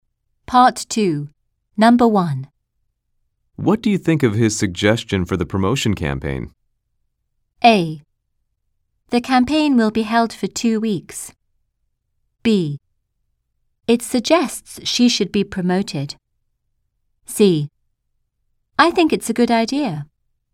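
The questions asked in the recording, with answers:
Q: What do you think of his suggestion for the promotion campaign?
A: C: I think it's a good idea.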